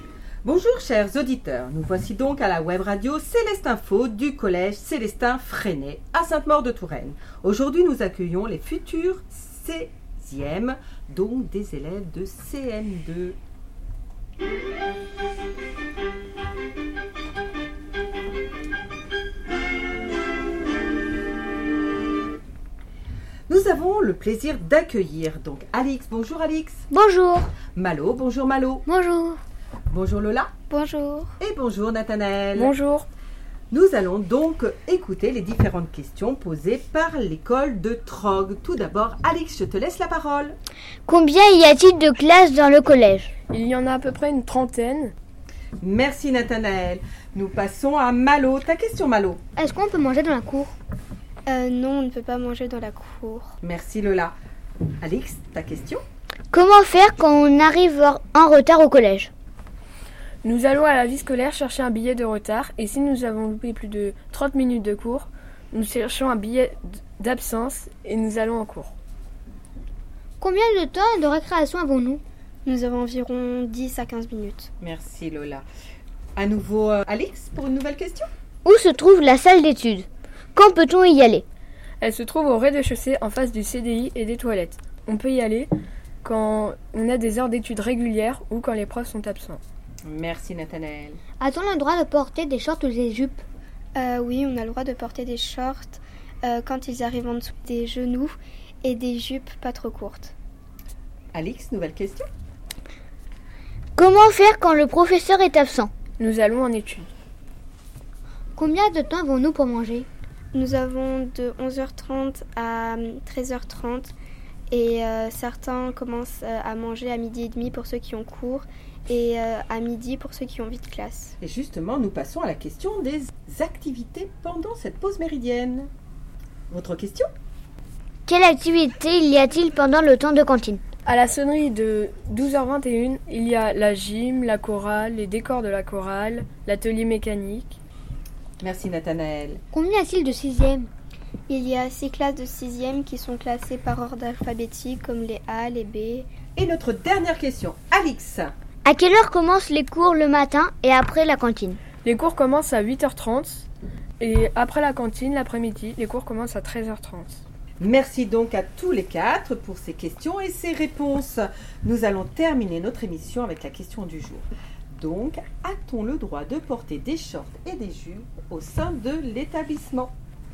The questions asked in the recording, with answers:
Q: Donc, a-t-on le droit de porter des shorts et des jupes au sein de l'établissement?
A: Nous avons le droit de porter des jupes et des shorts, mais à condition qu'ils ne soient pas trop courts.